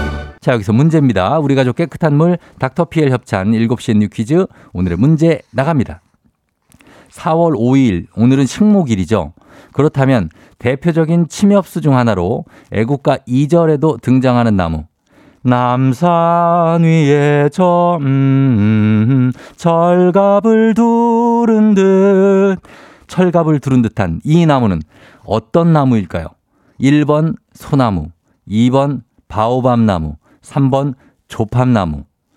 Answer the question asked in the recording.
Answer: 1번 소나무 정답.